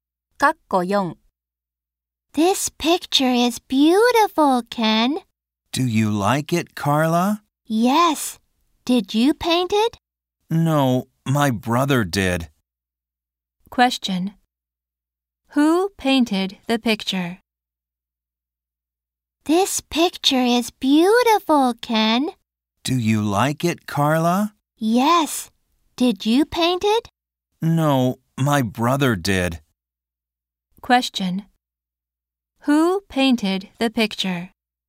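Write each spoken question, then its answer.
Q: Who painted the picture?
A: Ken's brother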